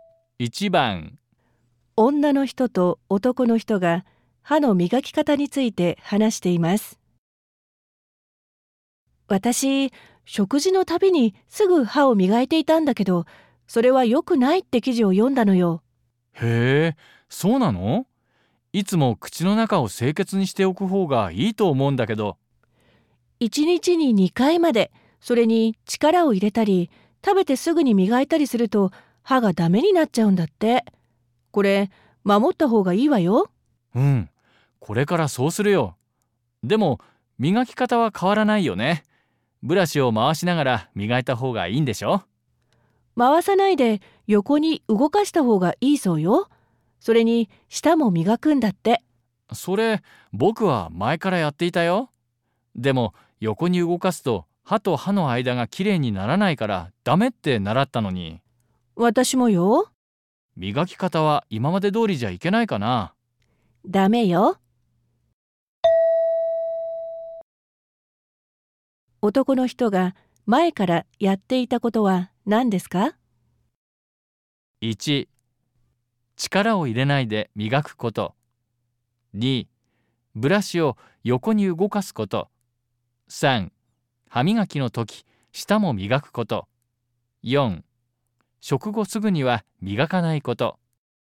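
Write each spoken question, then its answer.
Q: 男の人が前からやっていたことは何ですか?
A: 3: 歯磨きの時、舌も磨くこと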